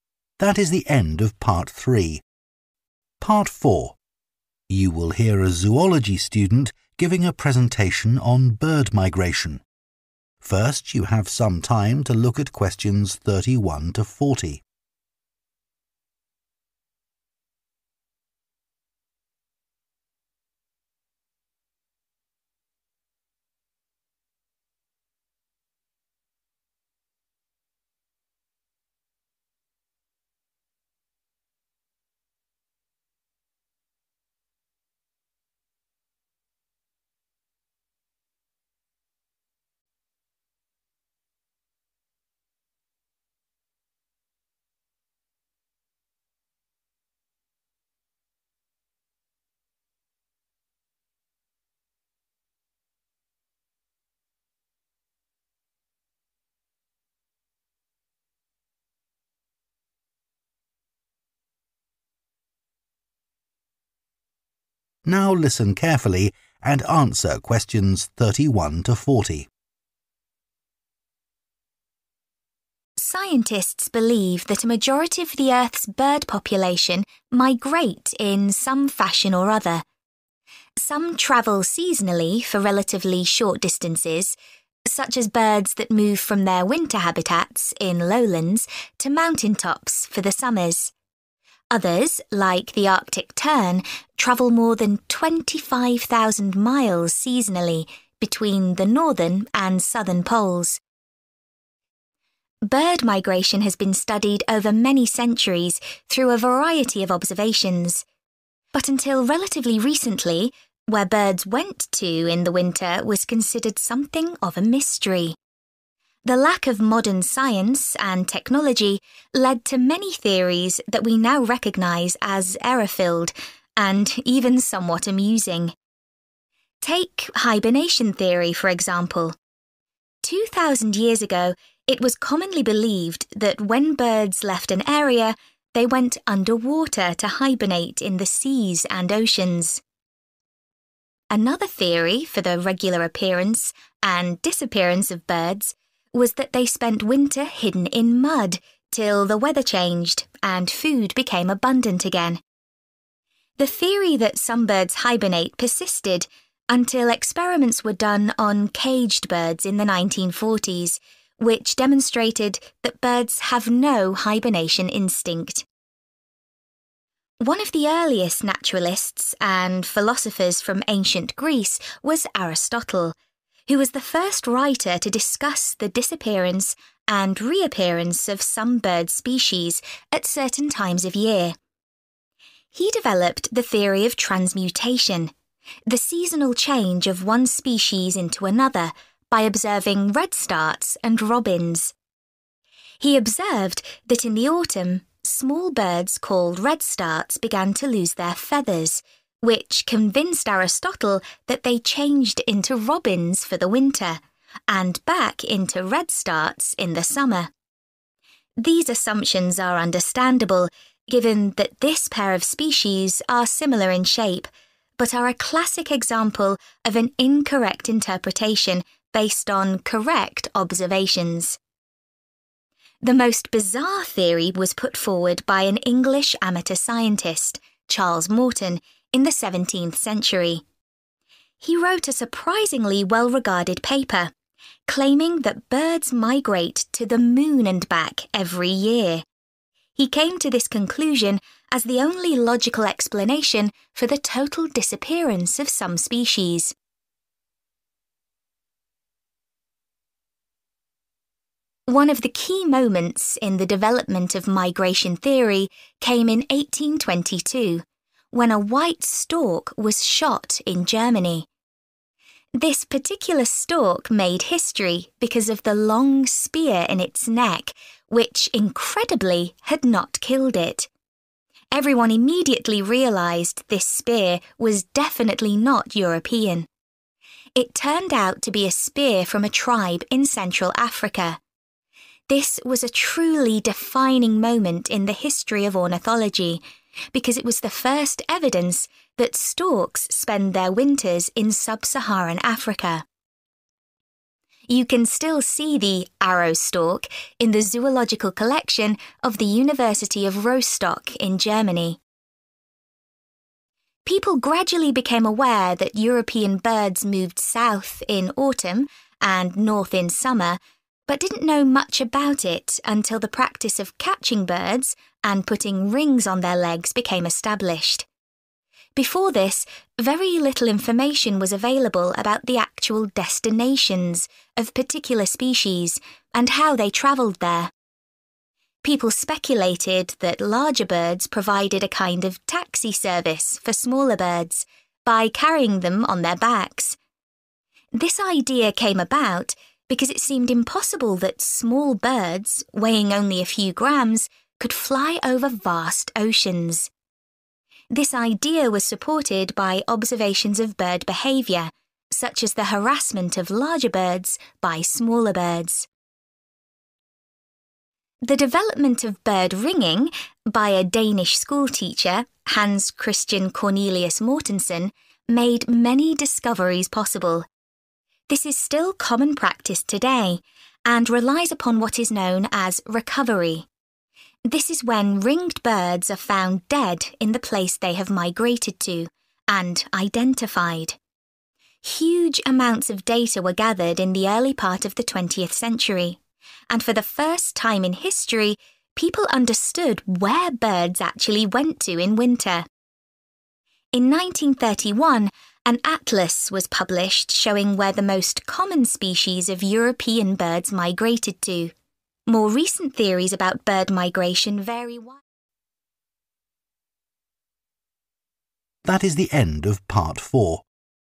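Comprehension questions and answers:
Complete the notes below.Write ONE WORD ONLY for each answer.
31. It was believed that birds hibernated underwater or buried themselves in 31 ....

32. In autumn he observed that redstarts experience the loss of 32 ...... and thought they then turned into robins.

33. Aristotle's assumptions were logical because the two species of birds had a similar 33 .....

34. Charles Morton popularised the idea that birds fly to the 34 ...... in winter.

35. In 1822, a stork was killed in Germany which had an African spear in its 35 ....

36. previously there had been no 36 ....... that storks migrate to Africa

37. Little was known about the 37 ...... and journeys of migrating birds until the practice of ringing was established.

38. It was thought large birds carried small birds on some journeys because they were considered incapable of travelling across huge 38 ...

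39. Ringing depended on what is called the 39 ...... of dead birds.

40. In 1931, the first 40 .... to show the migration of European birds was printed.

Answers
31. mud
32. feathers
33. shape
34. moon
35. neck
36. evidence
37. destinations
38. oceans
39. recovery
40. atlas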